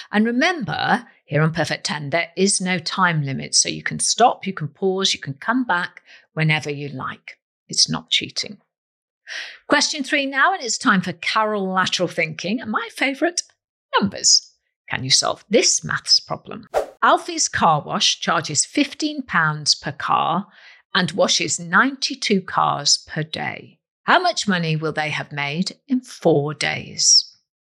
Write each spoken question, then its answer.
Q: How much money will they have made in 4 days?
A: £5,520.